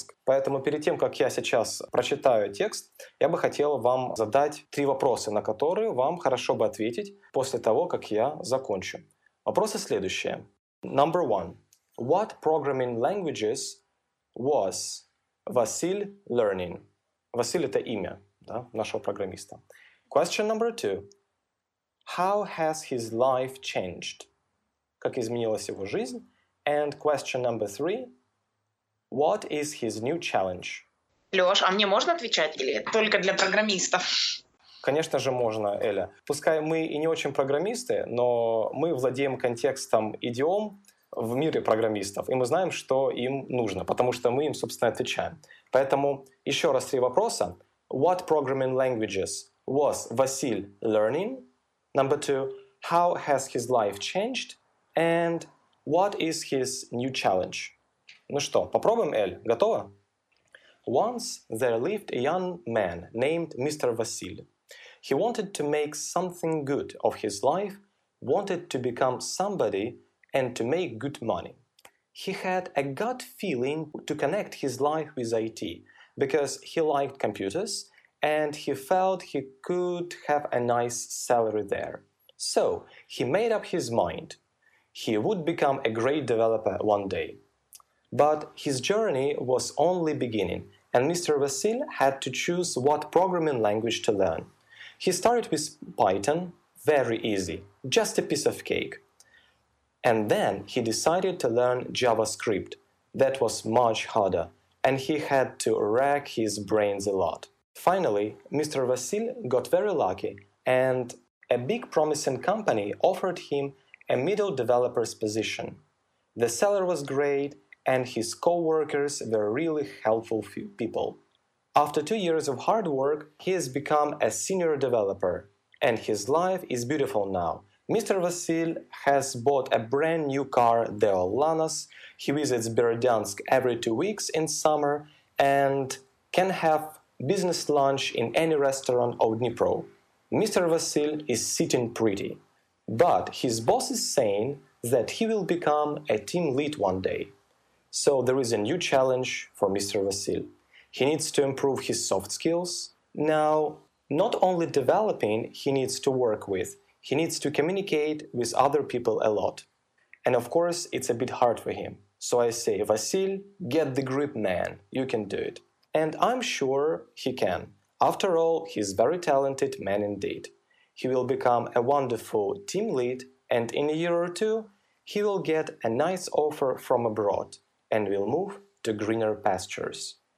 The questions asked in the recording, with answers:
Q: What programming languages was Василь learning?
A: he started with Python but it turned out to be a piece of cake for him.

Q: How has his life changed?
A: Well, his life has changed dramatically.

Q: What is his new challenge?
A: And his new challenge is very forthcoming one, as he's uh, going to become a team lead somewhere in the future.